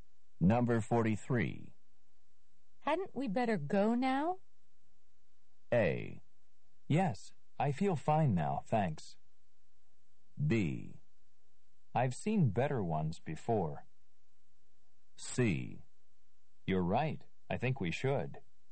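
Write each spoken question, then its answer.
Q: Hadn't we better go now?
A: C: You're right, I think we should.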